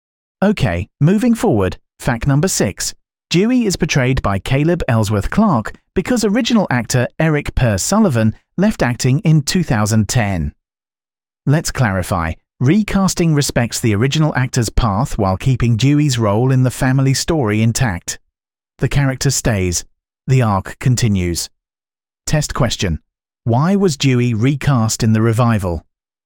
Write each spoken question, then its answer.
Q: Why was Dewey recast in the revival?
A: Correct answer. Eric Per Sullivan left acting.